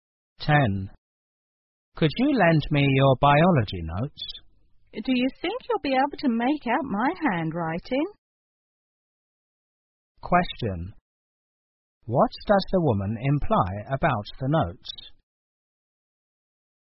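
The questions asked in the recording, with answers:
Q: What does the woman imply about the notes?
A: Her handwriting may be hard to read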